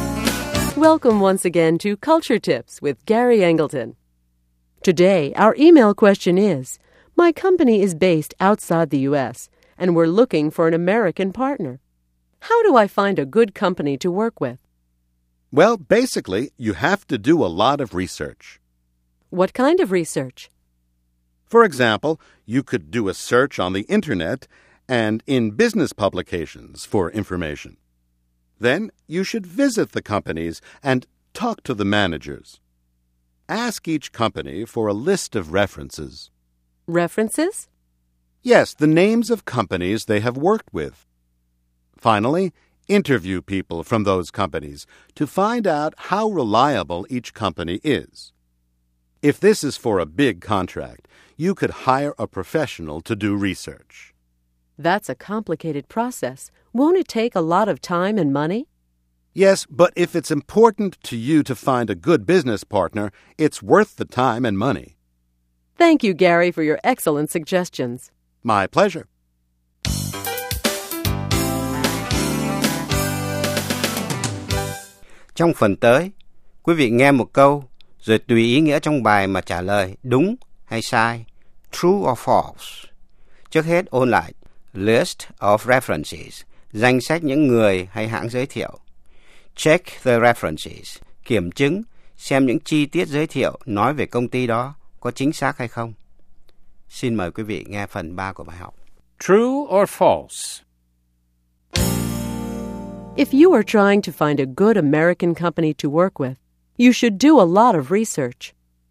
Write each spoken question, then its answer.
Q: If you are trying to find a good American company to work with, you should do a lot of research.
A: True. You should try to find out as much as possible about potential partners.